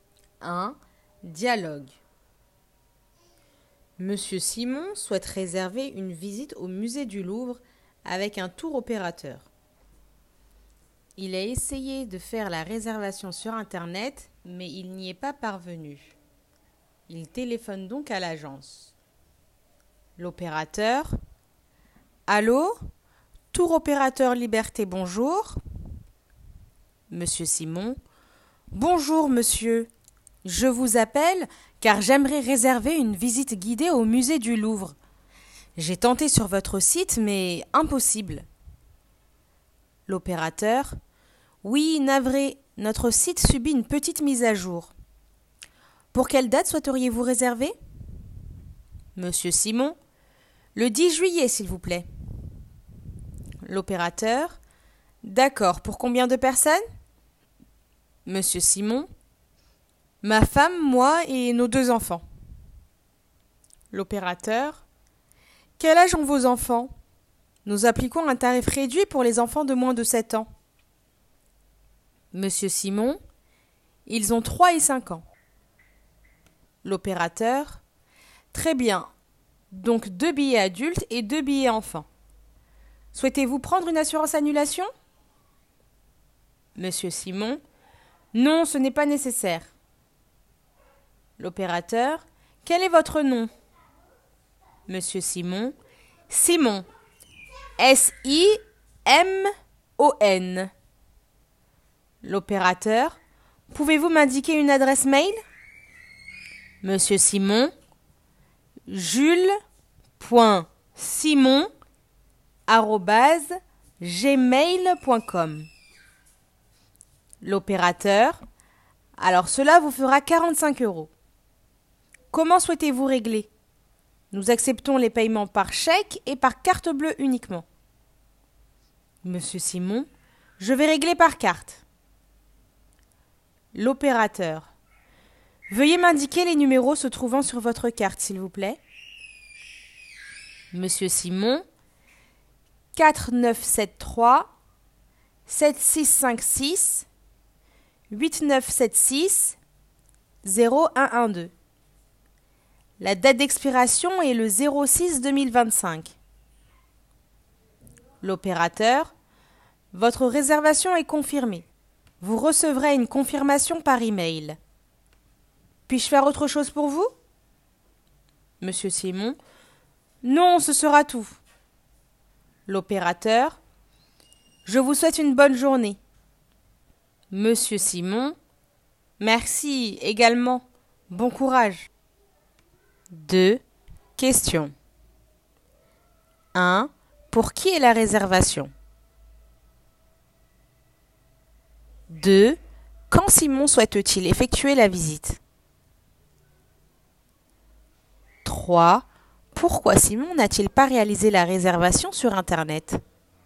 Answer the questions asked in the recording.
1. 1. Simon et sa famille.
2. 2. Cet été le 10 juillet.
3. 3. Car le site subit une mise à jour.